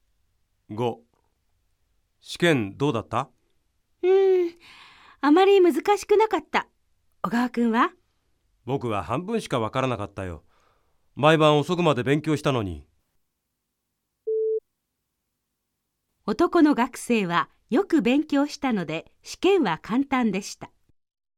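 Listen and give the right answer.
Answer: ×(間違い)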